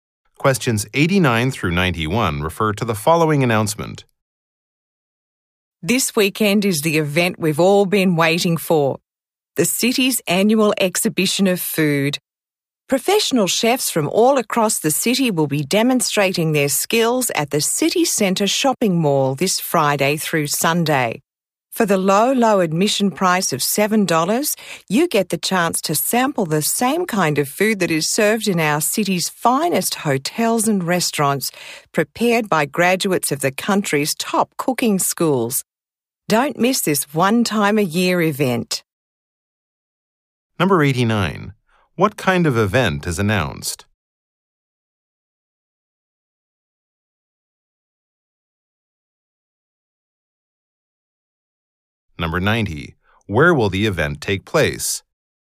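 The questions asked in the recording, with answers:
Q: event is announced?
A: A food exhibition

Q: Where will the event take place?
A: City Centre Shopping Mall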